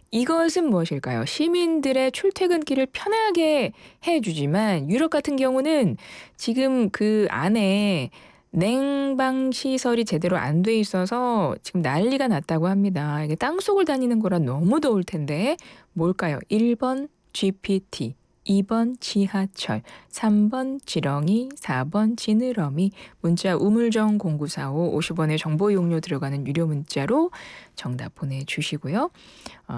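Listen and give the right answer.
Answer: 2: 지하철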